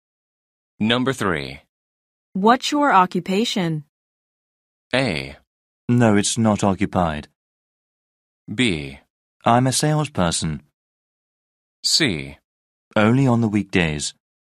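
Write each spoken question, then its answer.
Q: What's your occupation?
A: B: I'm a salesperson.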